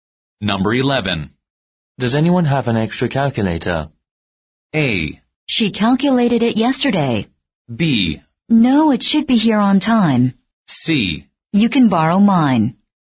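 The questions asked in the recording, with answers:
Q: Does anyone have an extra calculator?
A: C: You can borrow mine.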